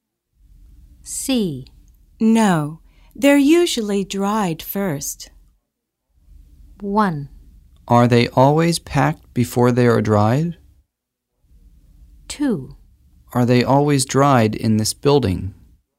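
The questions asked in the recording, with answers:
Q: No, they're usually dried first.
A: 1: Are they always packed before they are dried?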